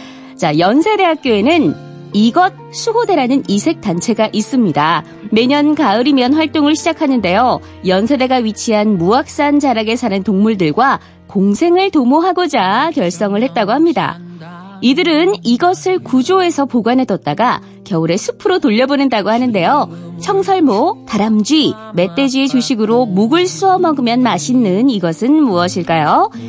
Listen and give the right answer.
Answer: 정답은 도토리였습니다.